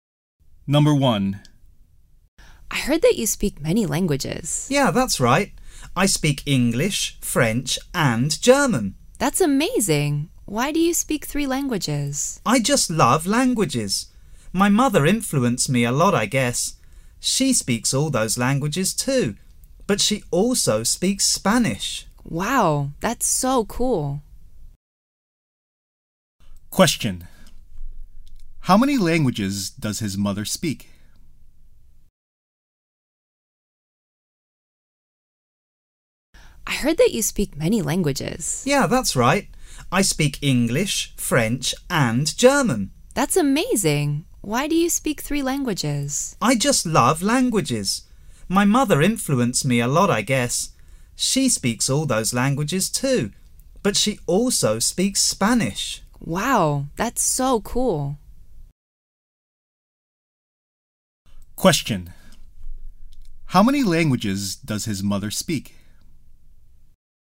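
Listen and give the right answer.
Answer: Four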